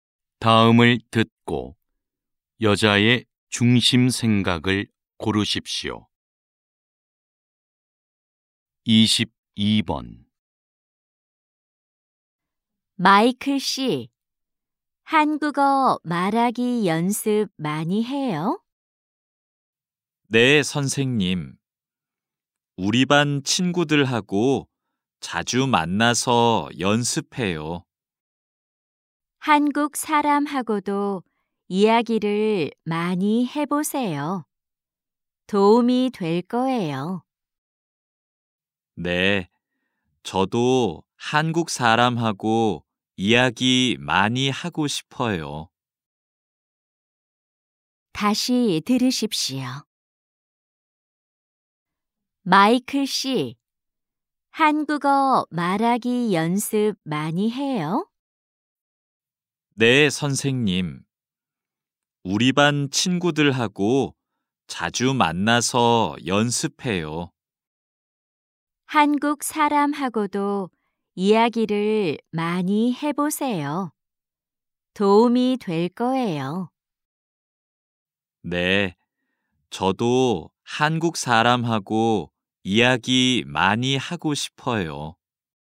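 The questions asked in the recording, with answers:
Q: 다음을 듣고 여자의 중심 생각을 고르십시오.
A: 한국 사람과 이야기를 많이 하면 한국어 말하기에 도움이 된다.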